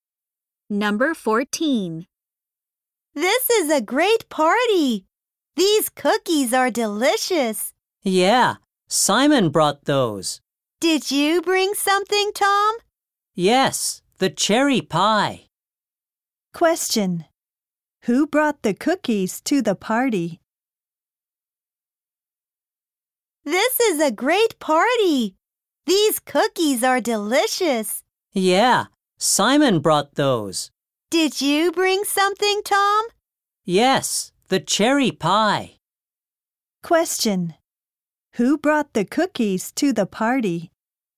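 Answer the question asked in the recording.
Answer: Simon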